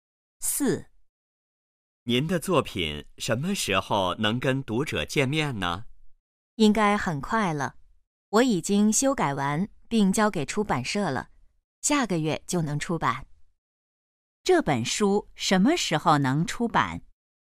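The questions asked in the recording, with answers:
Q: 这本书什么时候能出版?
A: 下个月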